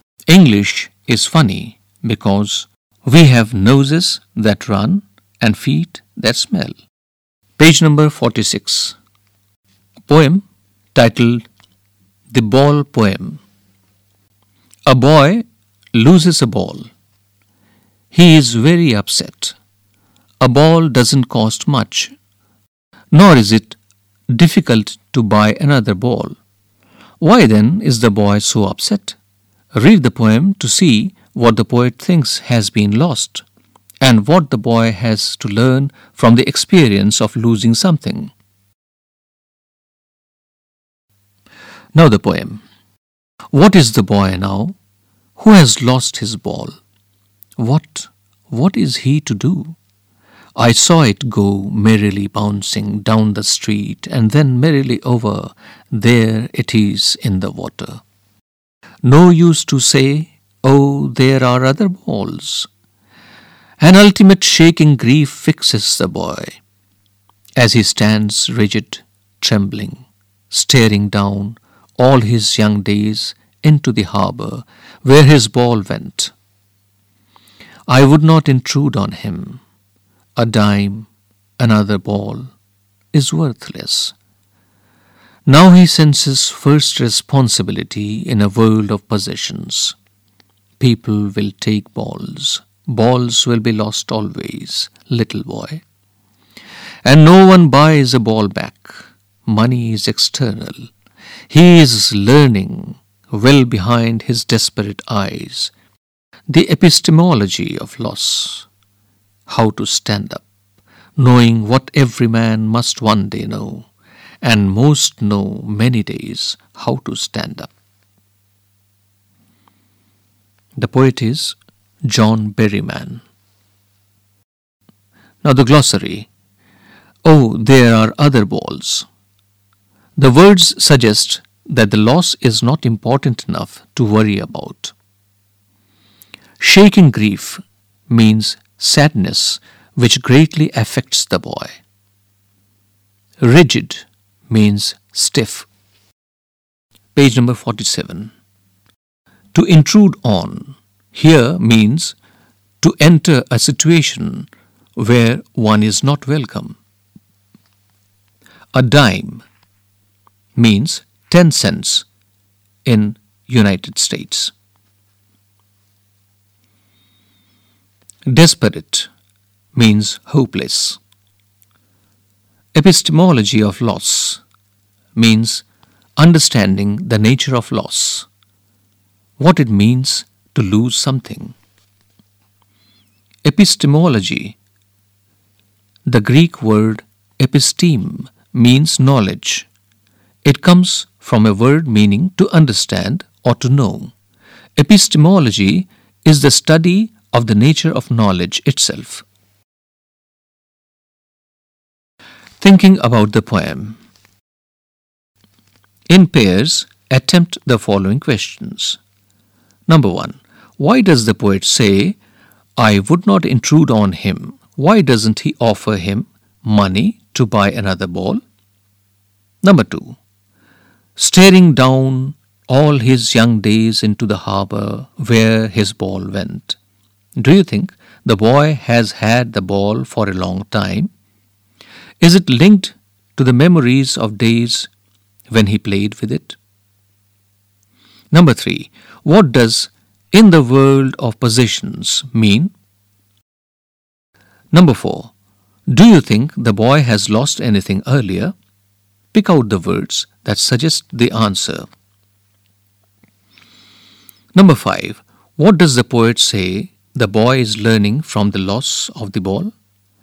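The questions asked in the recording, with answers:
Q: What does the poet say the boy is learning from the loss of the ball?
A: The epistemology of loss: what it means to lose something, and how to stand up after it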